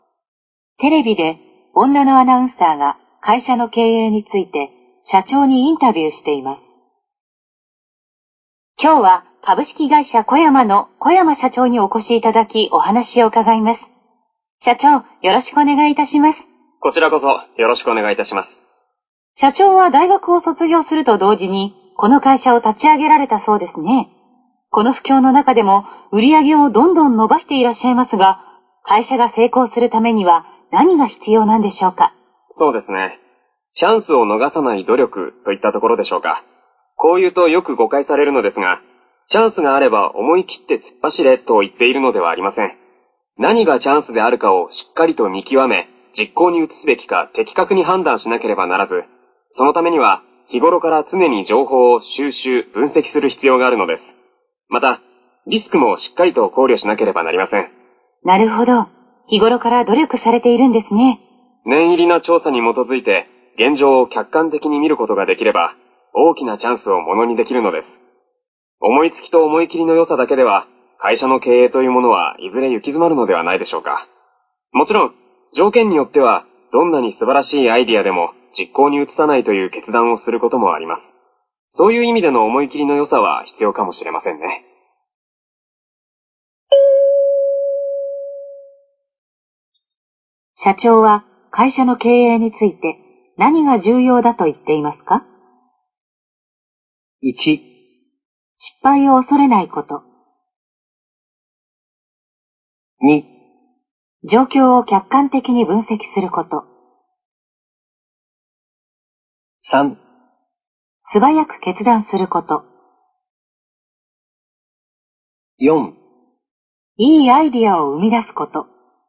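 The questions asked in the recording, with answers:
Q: 社長は会社の経営について何が重要だと言っていますか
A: 2: 状況を客観的に分析すること。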